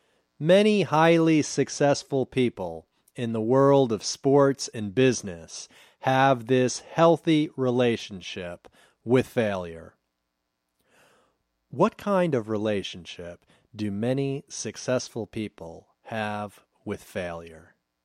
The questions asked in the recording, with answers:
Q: What kind of relationship do many successful people have with failure?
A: Many successful people have a healthy relationship with failure.